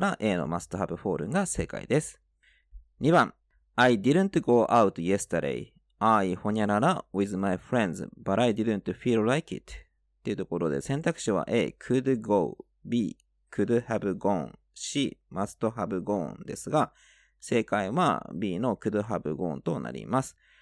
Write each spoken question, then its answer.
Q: I didn't go out yesterday. I ほにゃらら with my friends, but I didn't feel like it.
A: 正解は B の could have gone となります